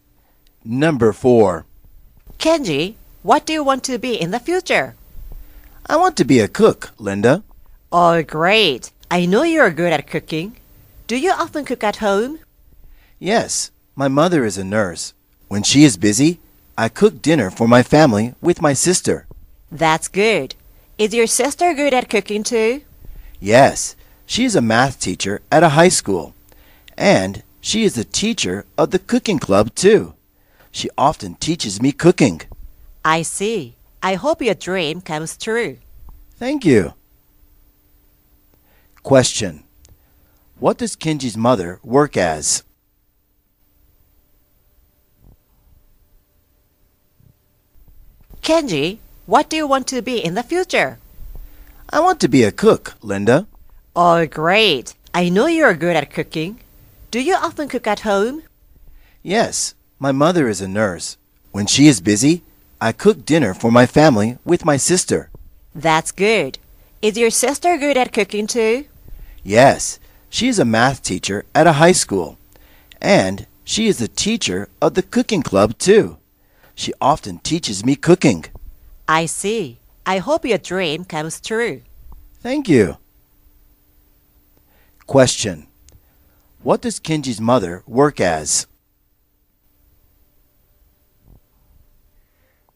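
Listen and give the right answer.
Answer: A nurse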